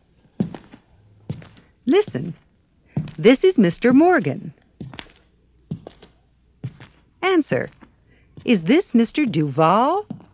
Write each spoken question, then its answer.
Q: Is this Mr. Duval?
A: No.